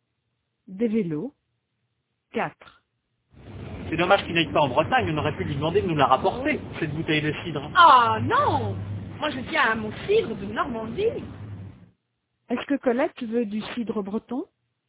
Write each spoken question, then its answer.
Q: Est-ce que Colette veut du cidre breton?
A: Non, elle veut du cidre de Normandie.